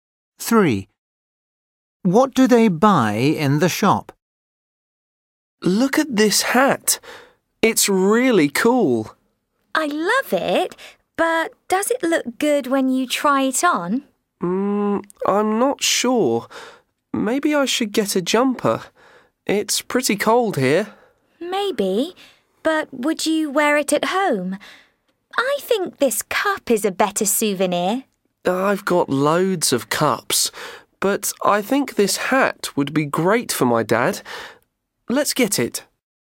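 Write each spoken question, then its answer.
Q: What do they buy in the shop?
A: a hat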